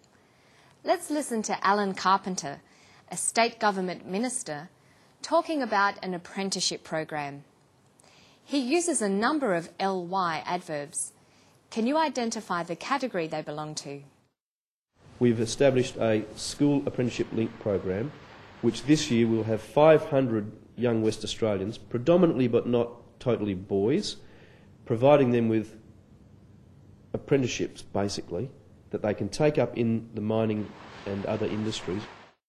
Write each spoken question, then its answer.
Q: Can you identify the category they belong to?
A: They're adverbs of degree.